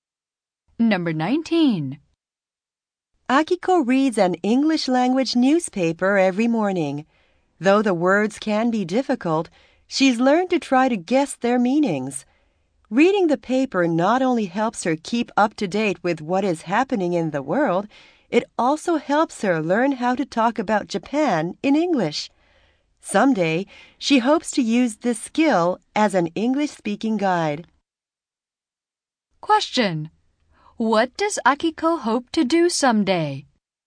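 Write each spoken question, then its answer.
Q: What does Akiko hope to do someday?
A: Work as an English-speaking guide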